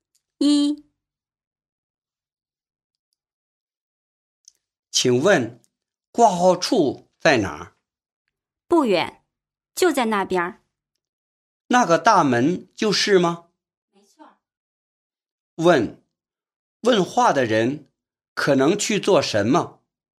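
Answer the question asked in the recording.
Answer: 去医院看病(挂号)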